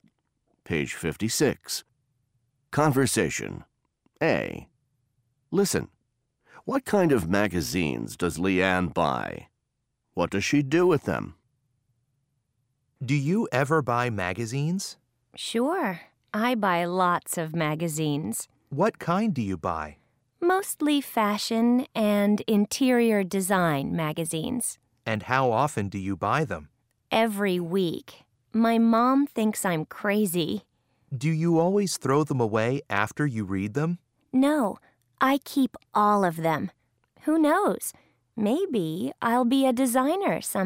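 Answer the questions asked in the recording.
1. Mostly fashion and interior design magazines
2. She keeps all of them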